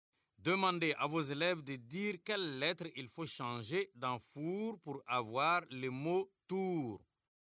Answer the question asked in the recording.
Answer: Monsieur, je fasse le F et j'écris un T.